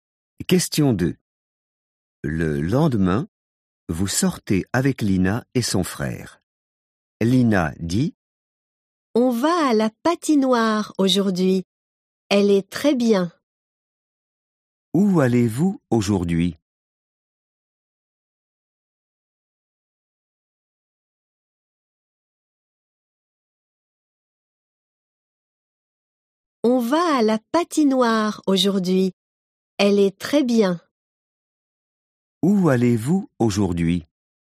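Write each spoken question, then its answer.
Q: Où allez-vous aujourd'hui?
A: à la patinoire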